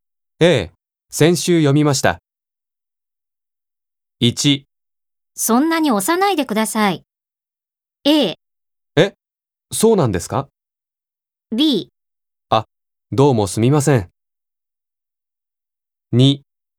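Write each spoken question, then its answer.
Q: そんなに押さないでください。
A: B: あ、どうもすみません。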